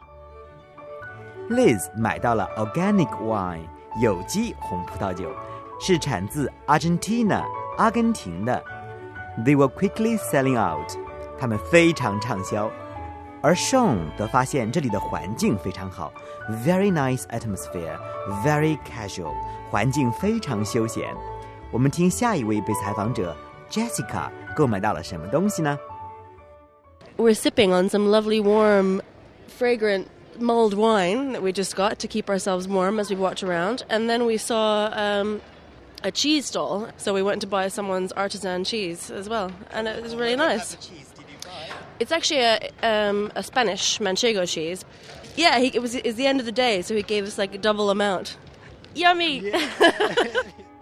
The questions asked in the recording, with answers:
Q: 我们听下一位被采访者 Jessica 购买到了什么东西呢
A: Jessica 买到了 mulled wine 热水果红酒